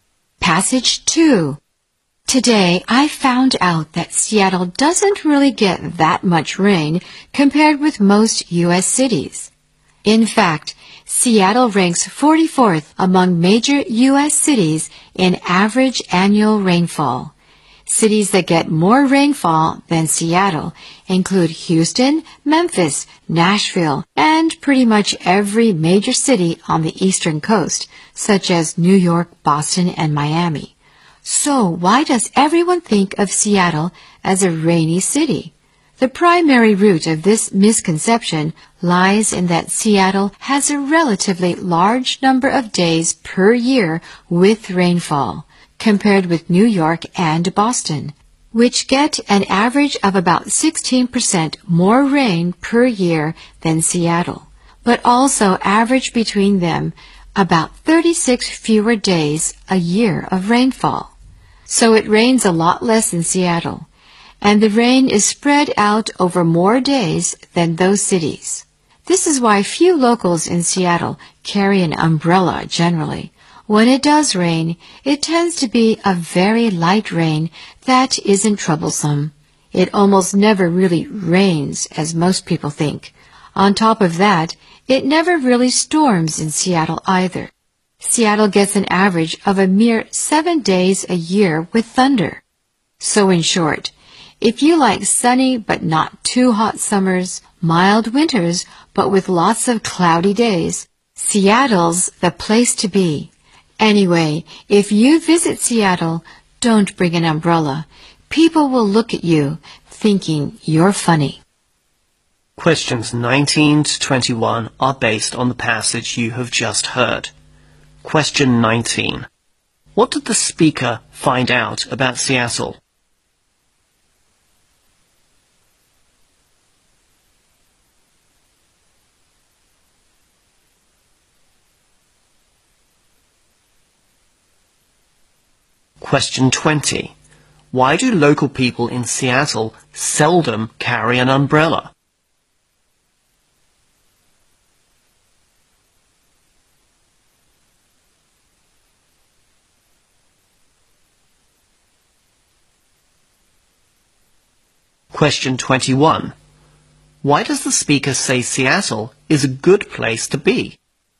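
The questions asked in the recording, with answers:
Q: What did the speaker find out about Seattle?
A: It doesn't get much rain compared with most U.S. cities

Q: Why do local people in Seattle seldom carry an umbrella?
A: The rain is usually very light

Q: Why does the speaker say Seattle is a good place to be?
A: Sunny but not too hot summers and mild winters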